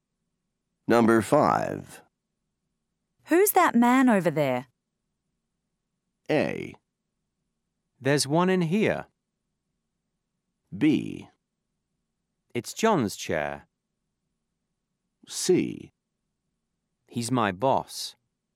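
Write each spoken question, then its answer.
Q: Who's that man over there?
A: C: He's my boss.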